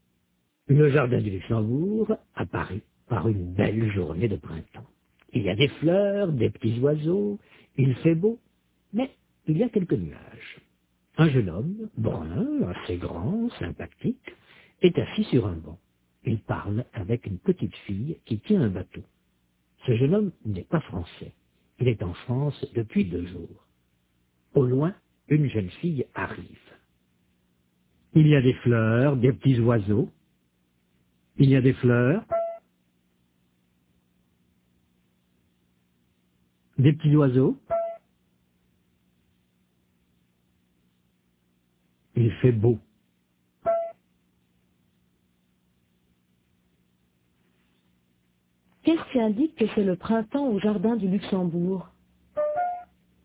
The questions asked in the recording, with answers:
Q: Qu'est-ce qui indique que c'est le printemps au jardin du Luxembourg?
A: Il y a des fleurs, des petits oiseaux.